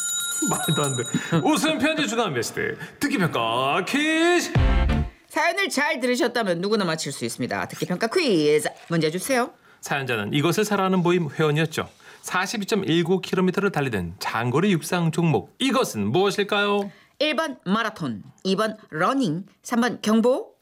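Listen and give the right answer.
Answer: 1번: 마라톤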